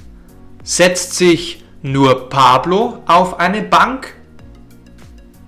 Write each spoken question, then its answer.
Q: Setzt sich nur Pablo auf eine Bank?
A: Nein, beide setzen sich auf eine Bank.